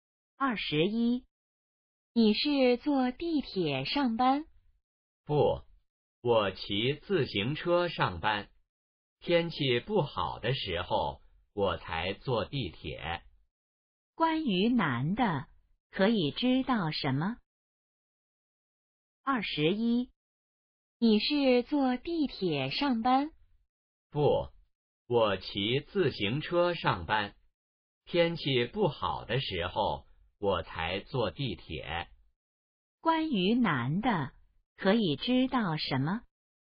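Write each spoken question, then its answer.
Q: 关于男的,可以知道什么?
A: 他一般骑自行车上班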